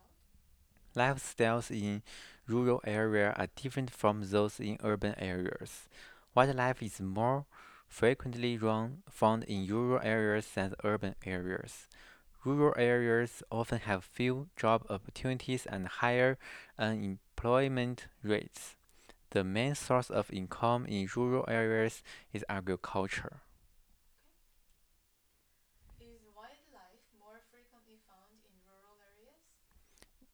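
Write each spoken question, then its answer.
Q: Is wildlife more frequently found in rural areas?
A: Yes, wildlife is more frequently found in rural areas.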